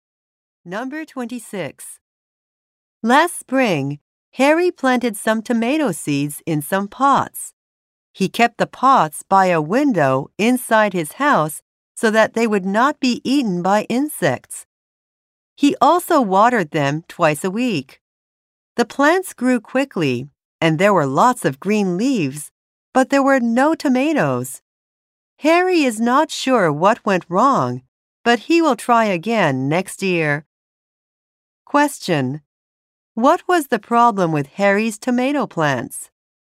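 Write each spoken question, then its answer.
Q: What was the problem with Harry's tomato plants?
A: They grew no tomatoes.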